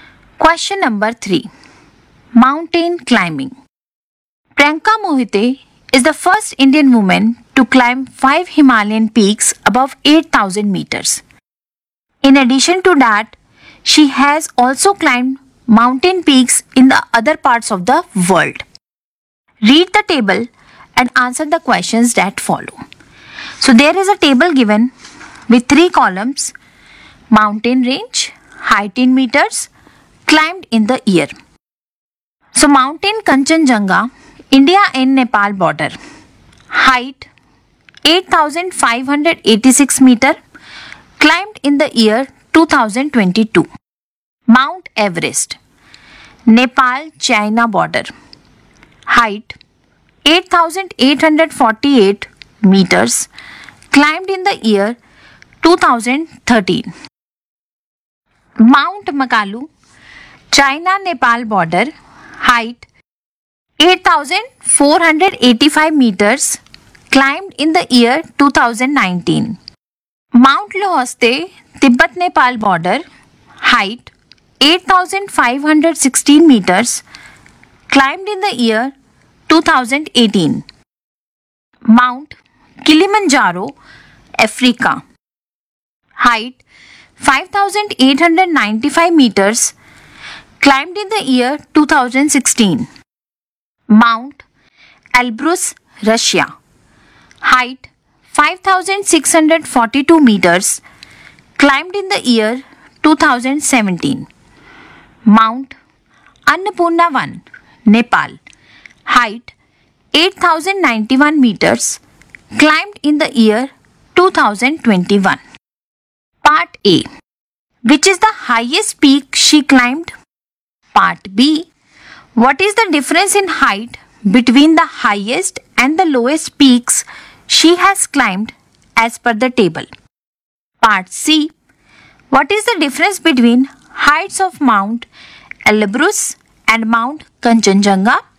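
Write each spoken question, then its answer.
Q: Which is the highest peak she climbed?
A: Mount Everest (8848 m)

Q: What is the difference in height between the highest and the lowest peaks she has climbed as per the table?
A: 3206 meters

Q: What is the difference between heights of Mount Elbrus and Mount Kanchenjunga?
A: 2944 meters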